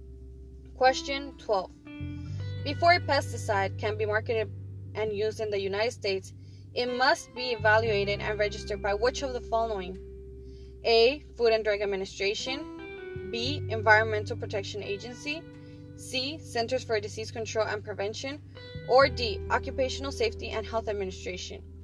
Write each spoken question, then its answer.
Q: Before a pesticide can be marketed and used in the United States, it must be evaluated and registered by which of the following?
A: Correct answer is B. Environmental Protection Agency.